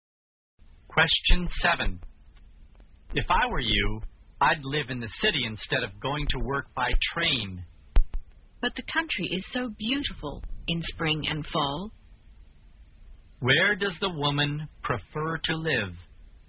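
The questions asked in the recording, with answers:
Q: Where does the woman prefer to live?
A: In the country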